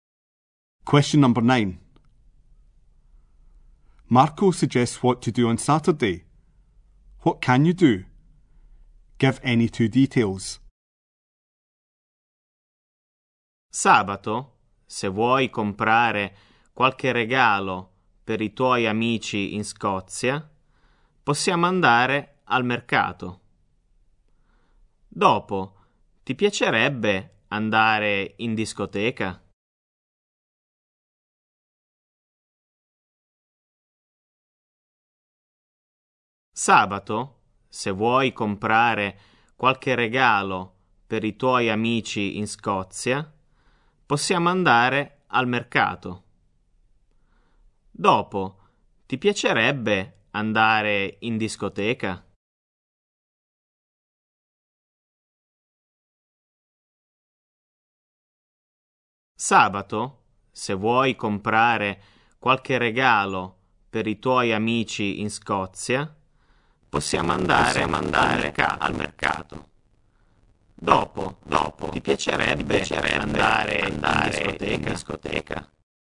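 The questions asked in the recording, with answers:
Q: What can you do? Give any two details.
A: Go to the market to buy presents for friends in Scotland; go to a disco afterwards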